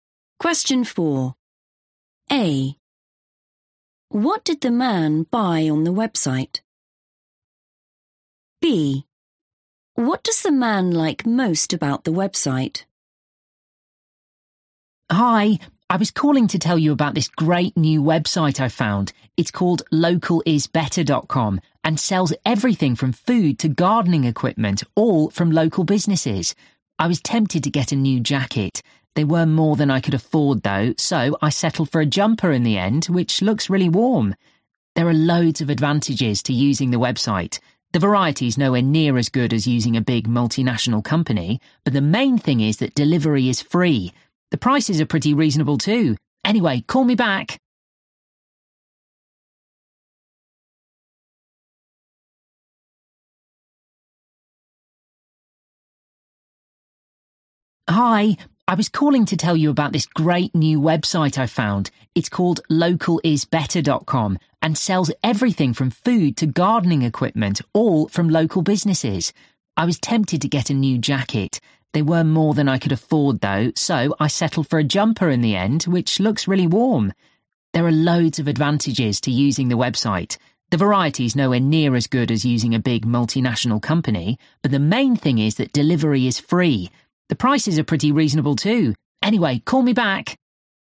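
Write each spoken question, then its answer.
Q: What did the man buy on the website?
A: a jumper

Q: What does the man like most about the website?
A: free delivery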